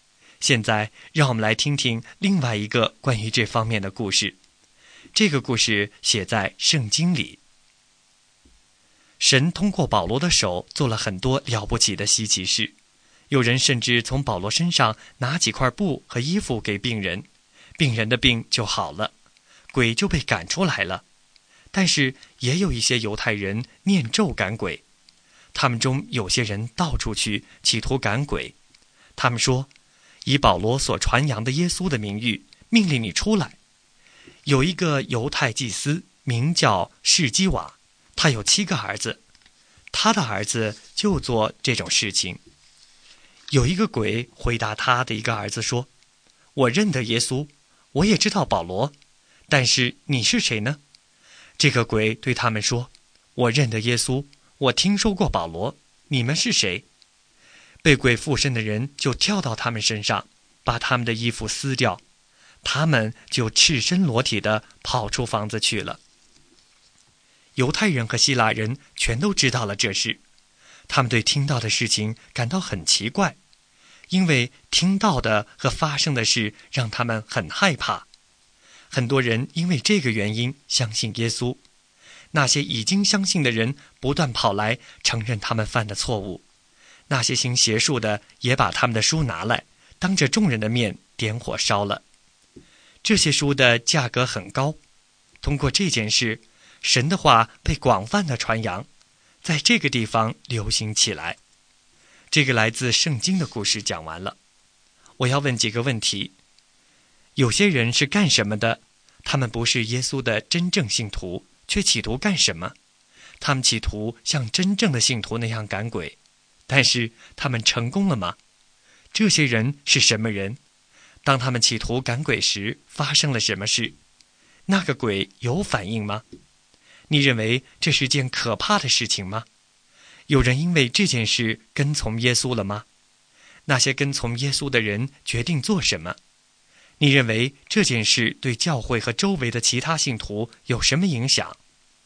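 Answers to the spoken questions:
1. 没有成功
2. 犹太祭司士基瓦的七个儿子(念咒赶鬼的犹太人)
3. 被鬼附身的人跳到他们身上,撕掉他们的衣服,他们赤身裸体地跑出房子
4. 有,鬼说:我认得耶稣,我也知道保罗,但是你们是谁?
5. 有,很多人因此相信耶稣
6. 承认自己的错误,把行邪术的书拿来当众烧掉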